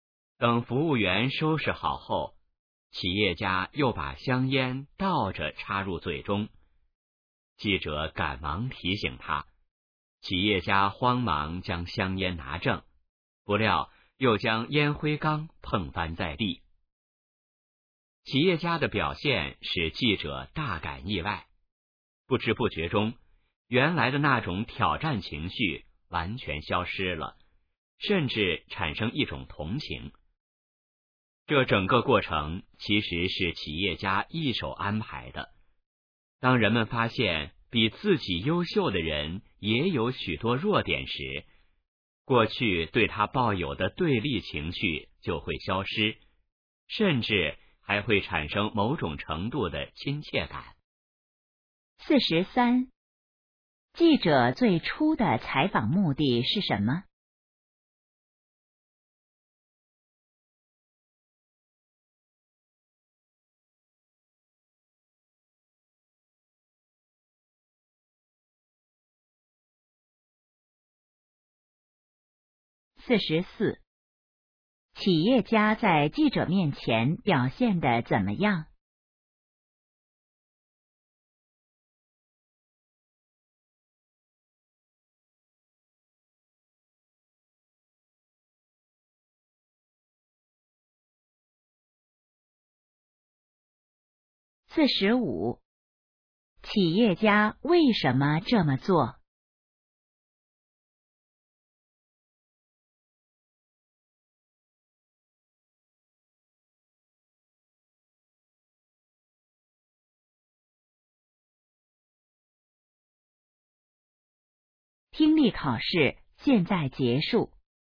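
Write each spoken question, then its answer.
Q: 企业家在记者面前表现得怎么样?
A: 紧张慌乱,接连出错

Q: 企业家为什么这么做?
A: 为了消除记者的对立情绪,让他产生亲切感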